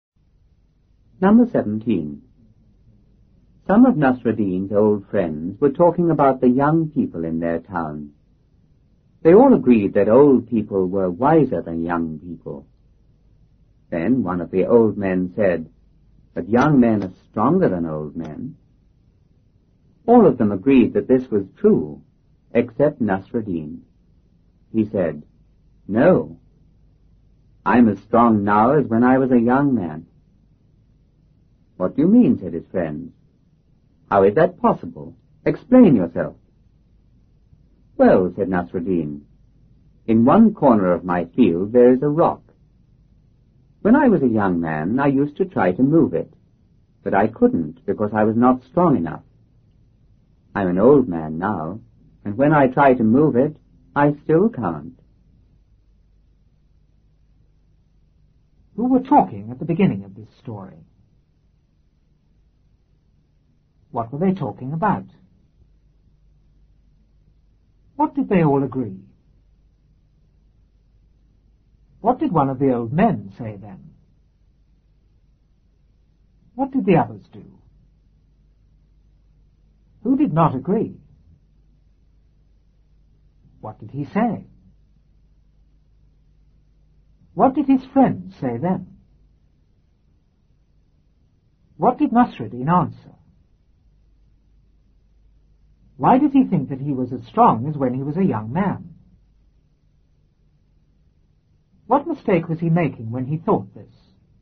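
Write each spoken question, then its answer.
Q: Who were talking at the beginning of this story?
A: Some of Nasruddin's old friends

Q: What were they talking about?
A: The young people in their town

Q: What did they all agree?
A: That old people were wiser than young people

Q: What did one of the old men say then?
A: But young men are stronger than old men

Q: What did the others do?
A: They all agreed that this was true, except Nasruddin

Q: Who did not agree?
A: Nasruddin

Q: What did he say?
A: I'm as strong now as when I was a young man

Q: What did his friends say then?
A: What do you mean? How is that possible? Explain yourself.

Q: What did Nasruddin answer?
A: As a young man he couldn't move a rock in his field, and now as an old man he still can't

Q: Why did he think that he was as strong as when he was a young man?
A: Because he couldn't move the rock then and he still can't now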